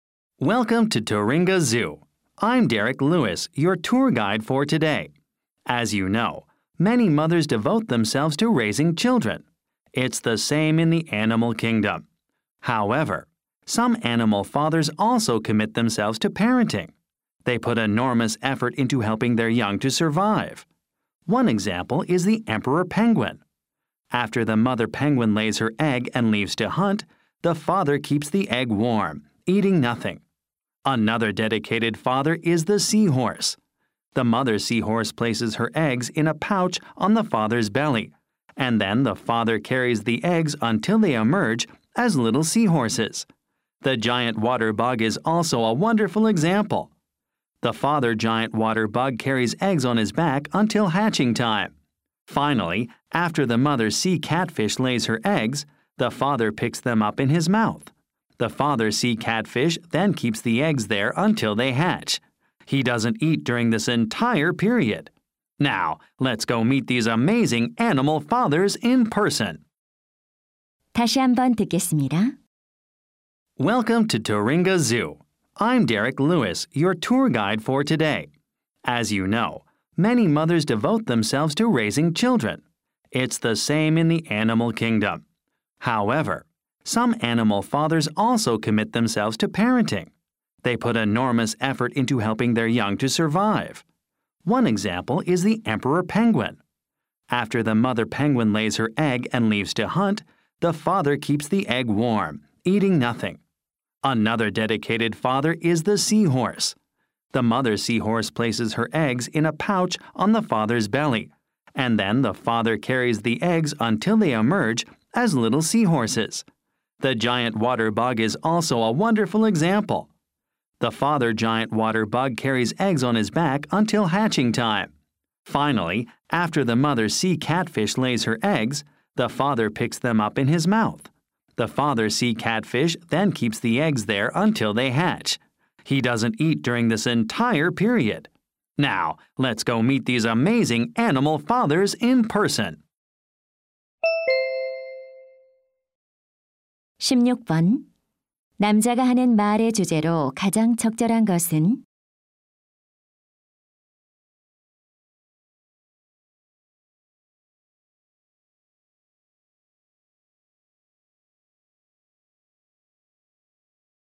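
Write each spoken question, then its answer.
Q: 남자가 하는 말의 주제로 가장 적절한 것은?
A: 새끼 양육에 헌신하는 동물 아빠들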